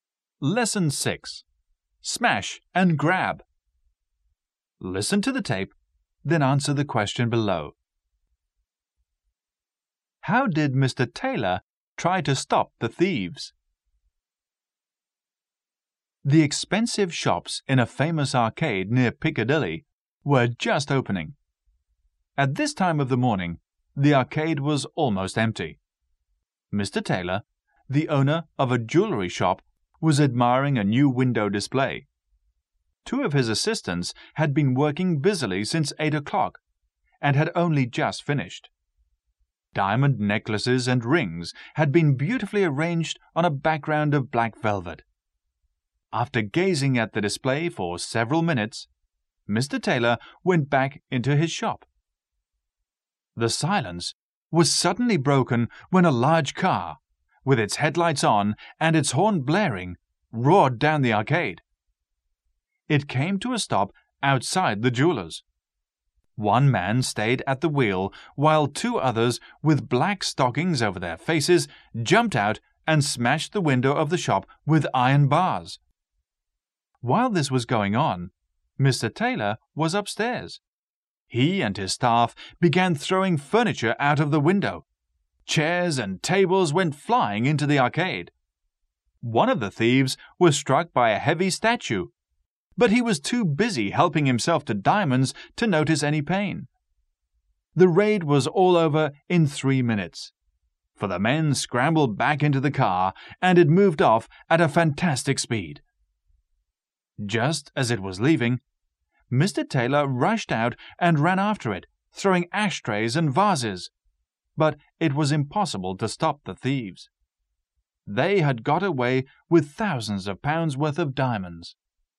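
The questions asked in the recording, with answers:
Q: How did Mr. Taylor try to stop the thieves?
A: He and his staff threw furniture out of the window, and he ran after the car throwing ashtrays and vases.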